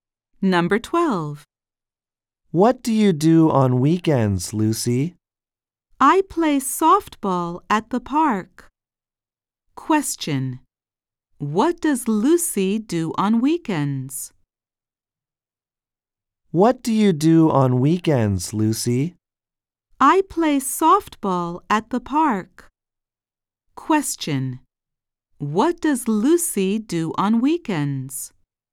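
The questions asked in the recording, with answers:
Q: What does Lucy do on weekends?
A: She plays softball at the park.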